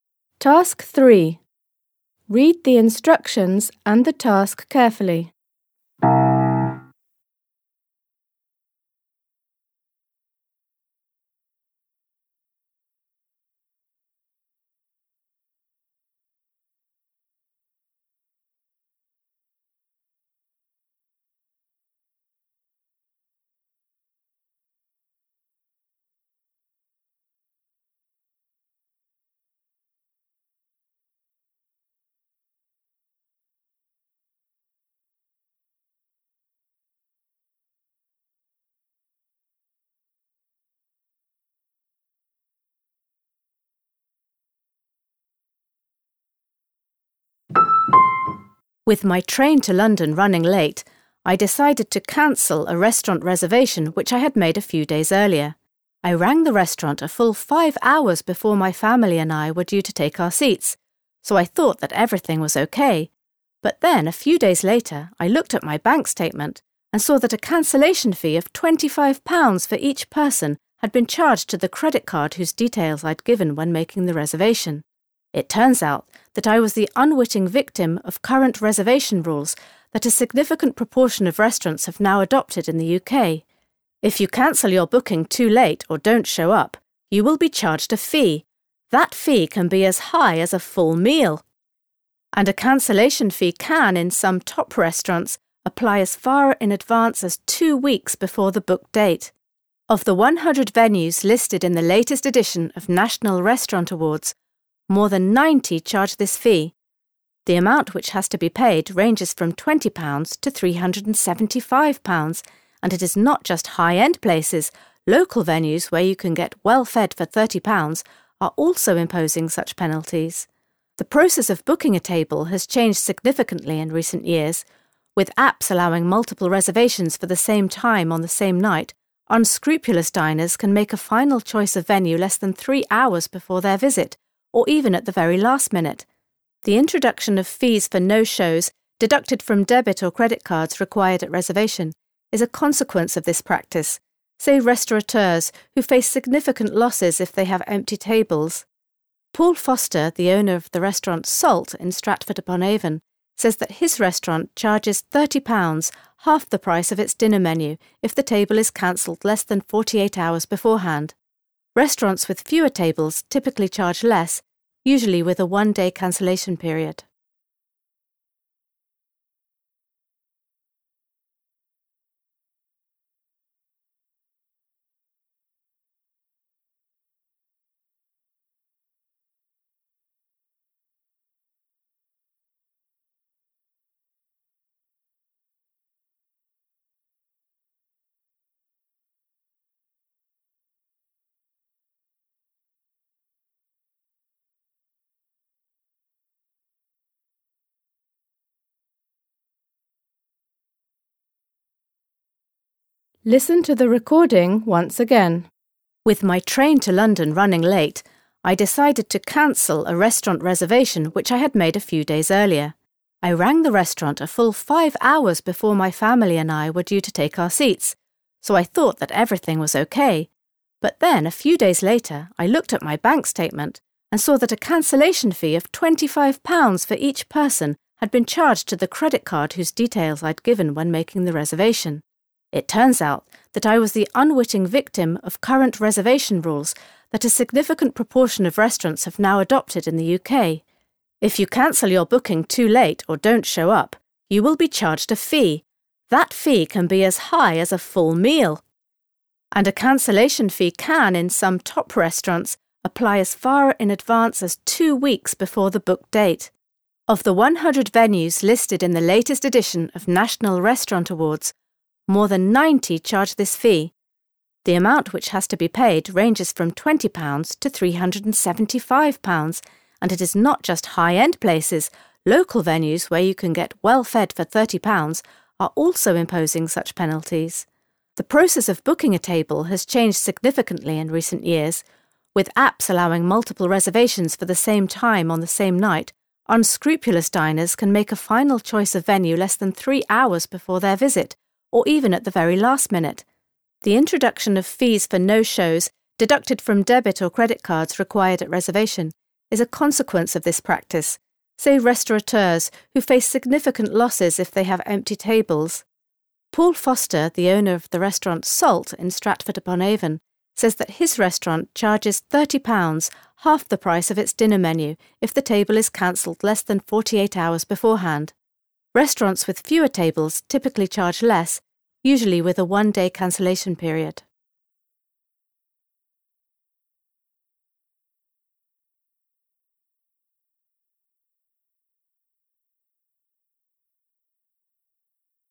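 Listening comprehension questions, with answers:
You are going to hear a text about a new trend in restaurants in the UK. Based on what you hear, complete the gap in each sentence (3.1.–3.4.). You will hear the recording twice.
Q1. When the speaker , she discovered that she had been charged a cancellation fee.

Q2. The problem for restaurant owners is that they due to multiple bookings.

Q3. To avoid paying the no-show fee at Paul Foster's restaurant, you have to before your visit is due to start.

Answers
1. checked her bank statement
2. face significant losses from empty tables
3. cancel your table at least 48 hours

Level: Poziom: dwujęzyczny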